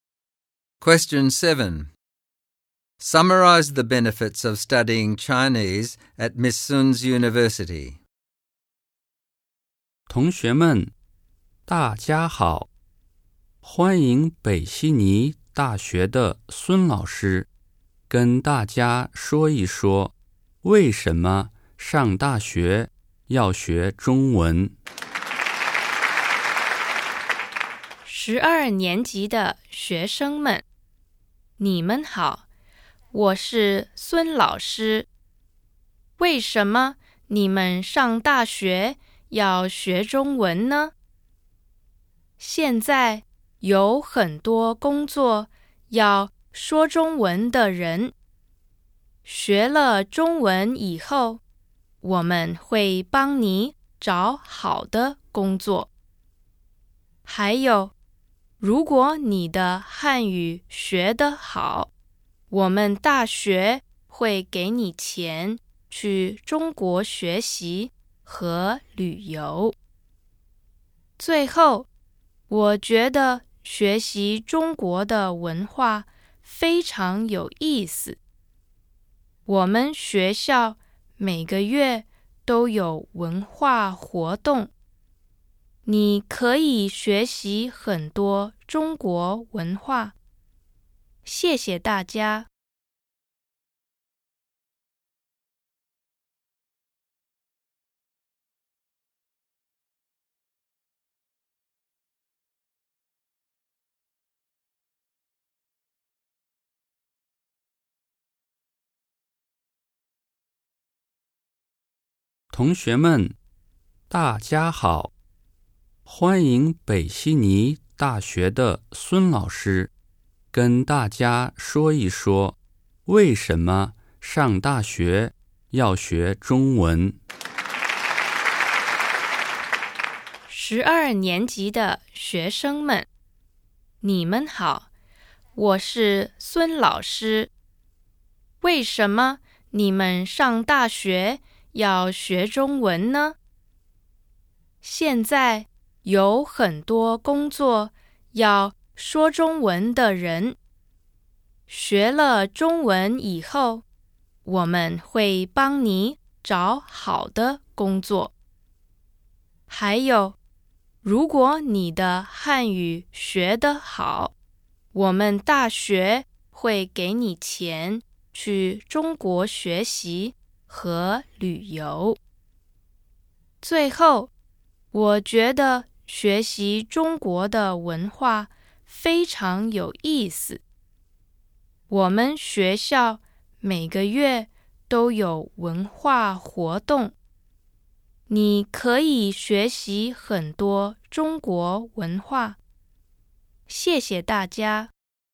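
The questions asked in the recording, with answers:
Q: Summarize the benefits of studying Chinese at Miss Sun's University.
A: Help finding a good job, money to study and travel in China if your Chinese is good, and cultural activities every month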